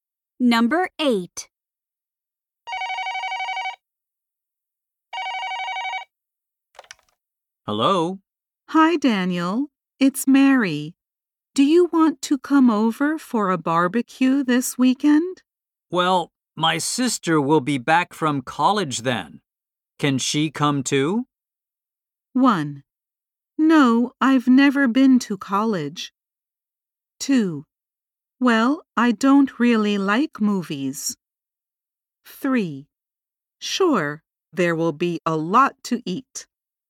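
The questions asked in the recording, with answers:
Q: Can she come too?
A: 3: Sure, there will be a lot to eat.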